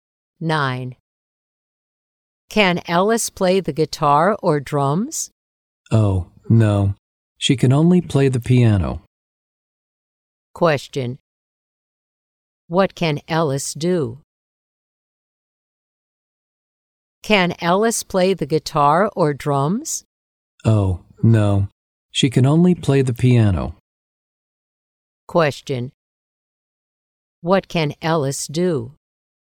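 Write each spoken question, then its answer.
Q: What can Alice do?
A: She can play the piano.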